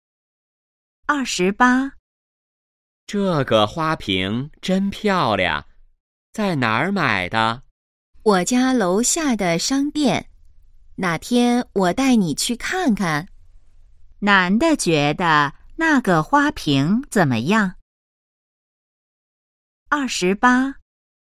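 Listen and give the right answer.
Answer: 很漂亮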